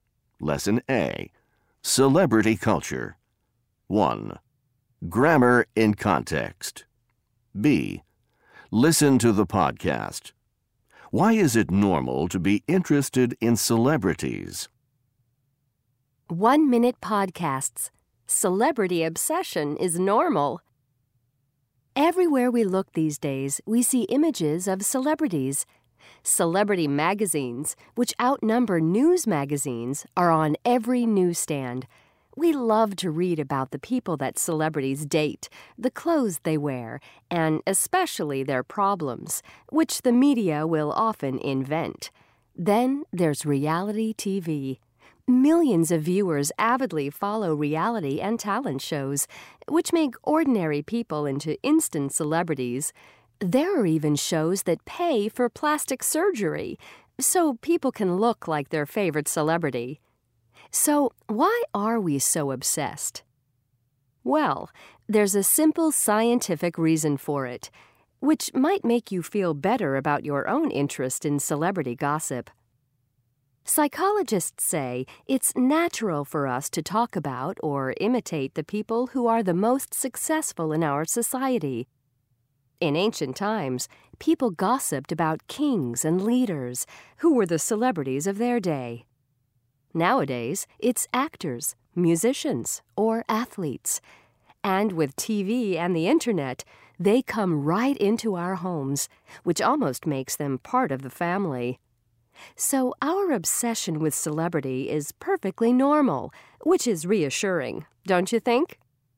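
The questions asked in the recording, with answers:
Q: Why is it normal to be interested in celebrities?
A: It's natural to talk about or imitate the most successful people in our society.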